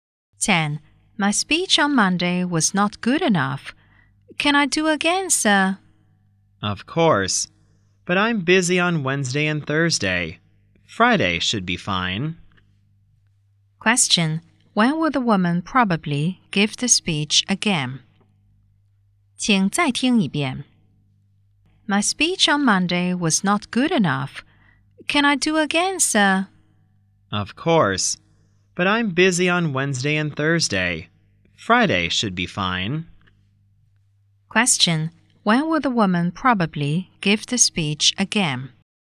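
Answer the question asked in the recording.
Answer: On Friday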